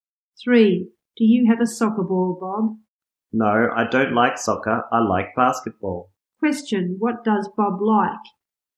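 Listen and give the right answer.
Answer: Basketball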